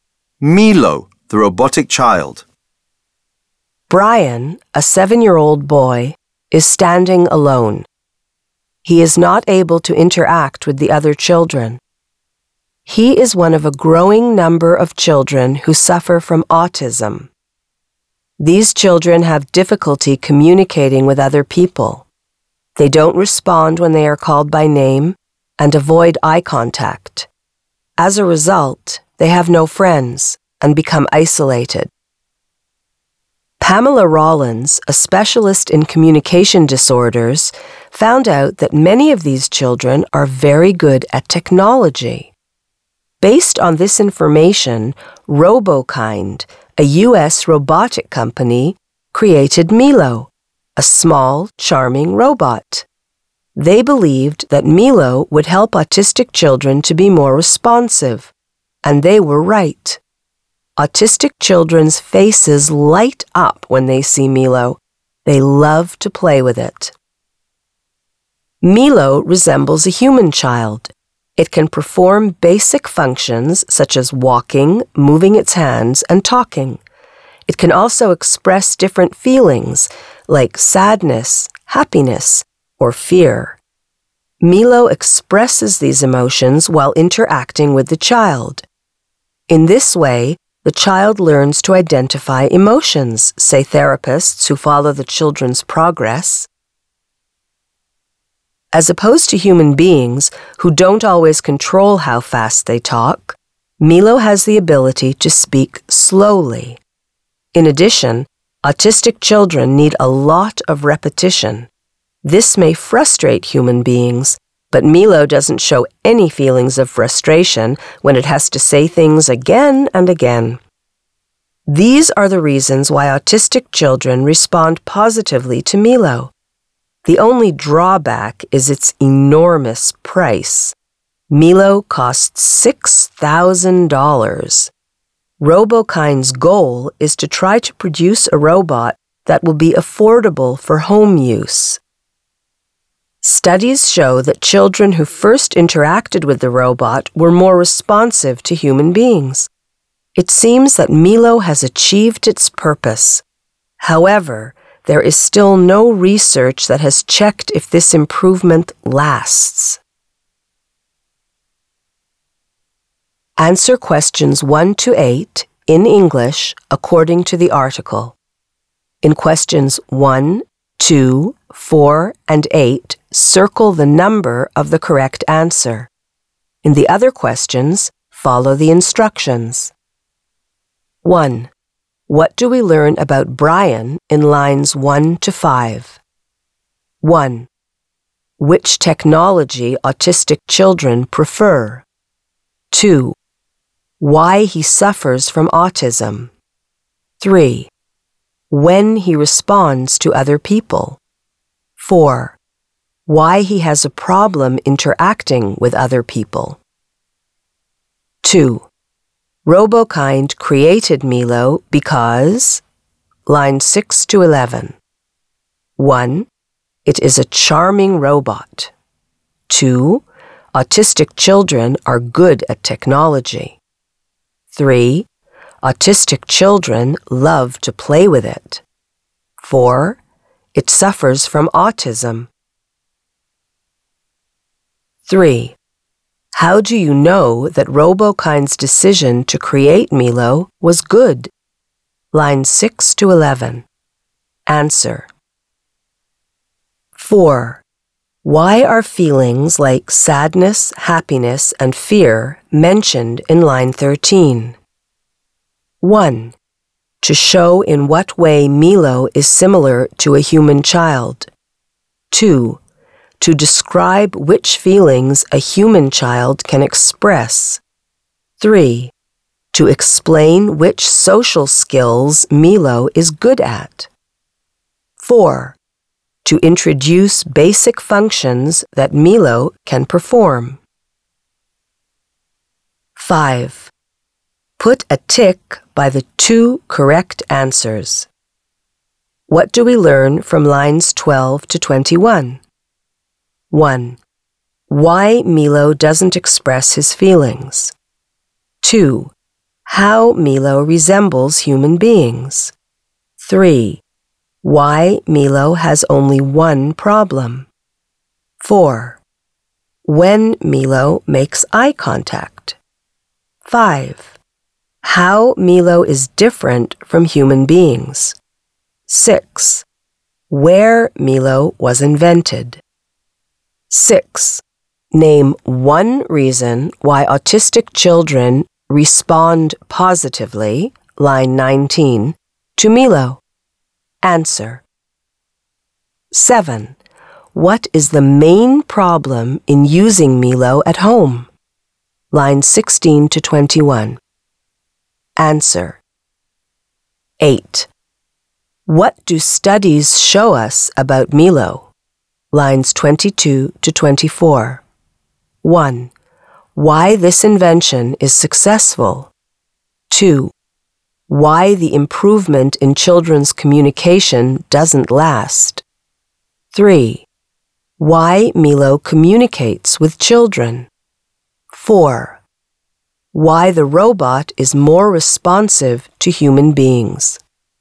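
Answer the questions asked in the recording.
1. 4: Why he has a problem interacting with other people
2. 2: Autistic children are good at technology.
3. Autistic children became more responsive; their faces light up when they see Milo
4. 1: To show in what way Milo is similar to a human child.
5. 2: How Milo resembles human beings; 5: How Milo is different from human beings
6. Milo speaks slowly and doesn't get frustrated repeating things
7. Its enormous price ($6,000)
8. 1: Why this invention is successful.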